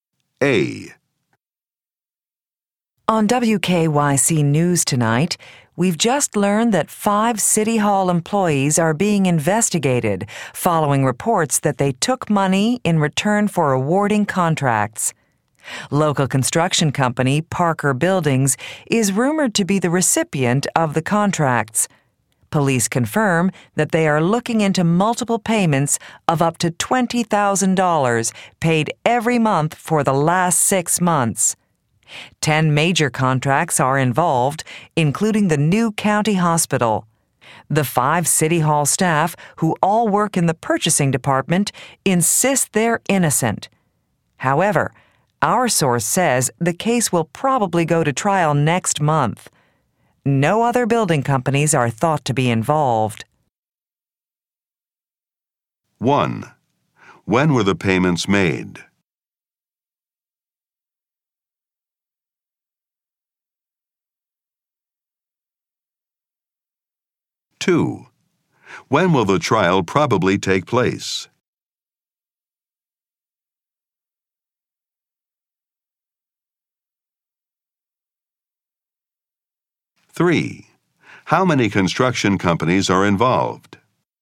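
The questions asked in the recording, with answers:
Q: When were the payments made?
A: Every month for the last 6 months

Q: When will the trial probably take place?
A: Next month

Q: How many construction companies are involved?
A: One (Parker Buildings)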